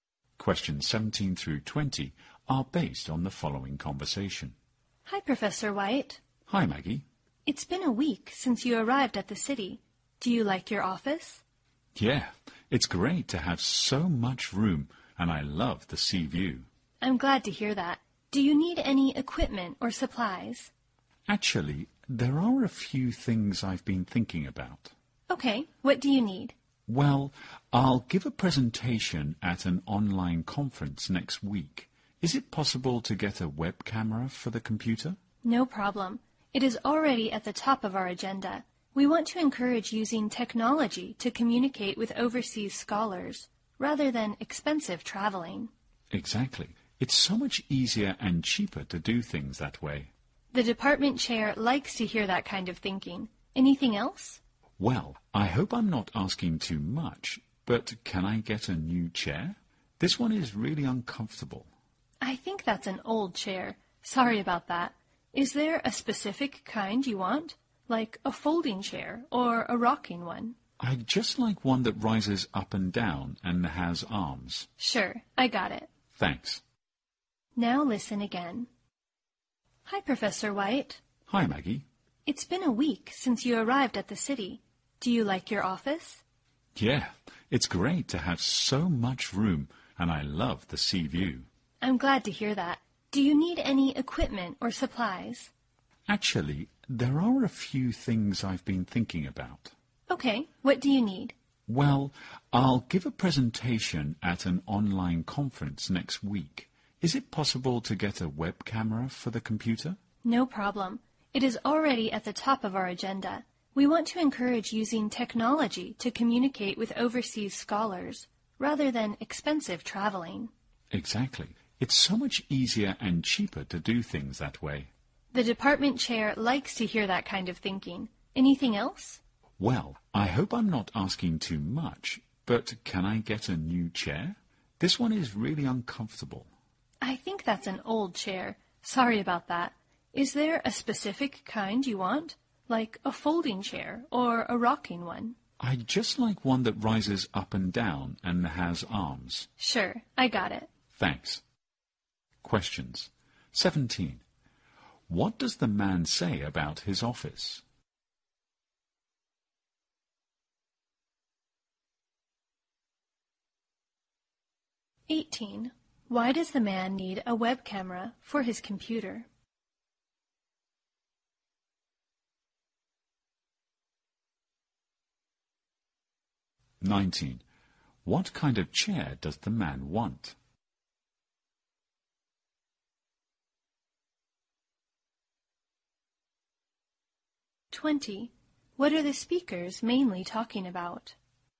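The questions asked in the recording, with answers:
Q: Why does the man need a web camera for his computer?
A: To give a presentation at an online conference.

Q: What kind of chair does the man want?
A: One that rises up and down and has arms.

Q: What are the speakers mainly talking about?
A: Equipment and supplies needed for the office.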